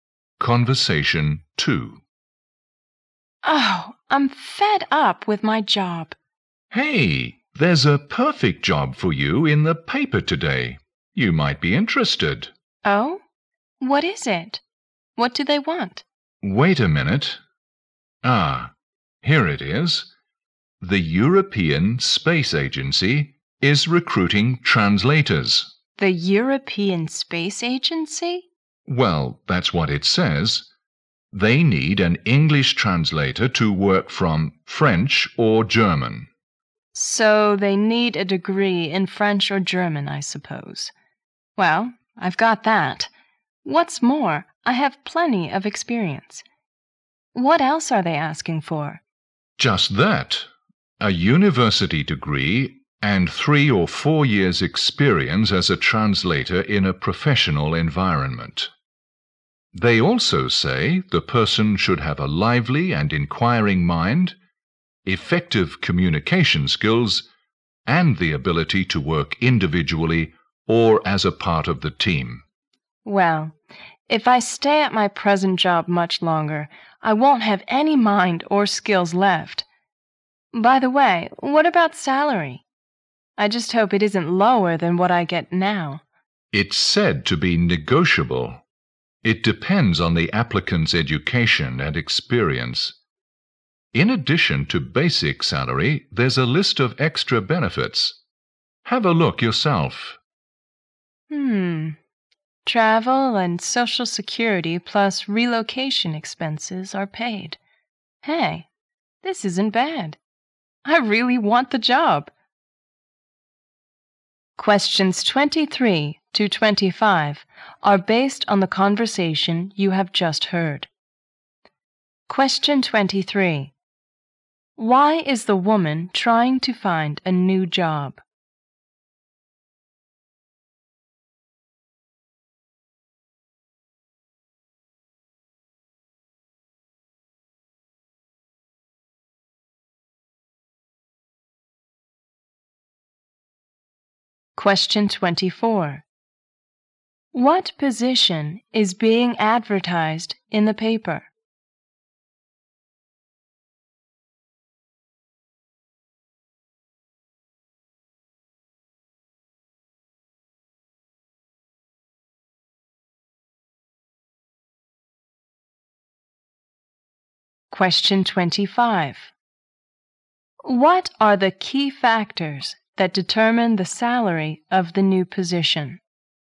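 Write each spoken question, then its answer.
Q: Why is the woman trying to find a new job?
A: She is fed up with her present job.

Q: What position is being advertised in the paper?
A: An English translator at the European Space Agency.

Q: What are the key factors that determine the salary of the new position?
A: The applicant's education and experience.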